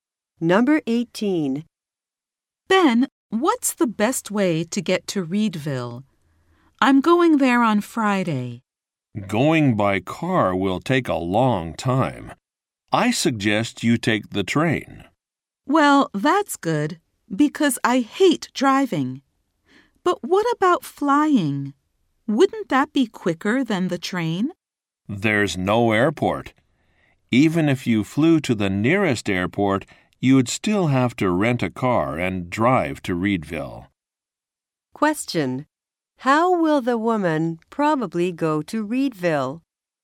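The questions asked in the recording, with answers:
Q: How will the woman probably go to Reedville?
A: By train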